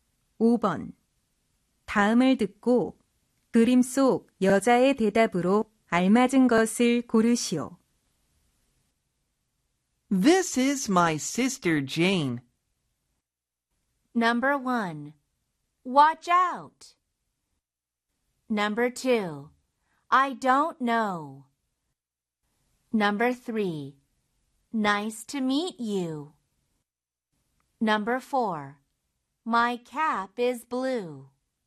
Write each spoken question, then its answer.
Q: 다음을 듣고 그림 속 여자의 대답으로 알맞은 것을 고르시오.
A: 그림 속 여자의 대답은 3번.